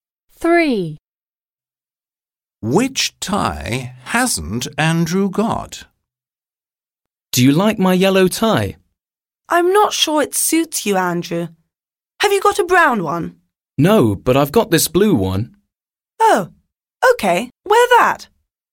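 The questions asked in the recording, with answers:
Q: Which tie hasn't Andrew got?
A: A brown tie.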